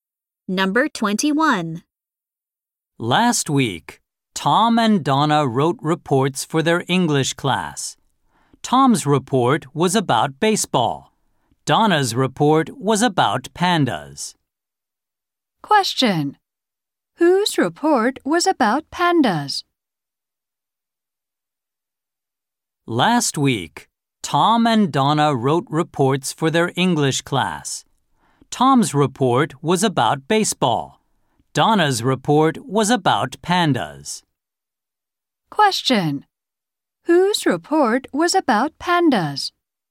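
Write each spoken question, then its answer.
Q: Whose report was about pandas?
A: Donna's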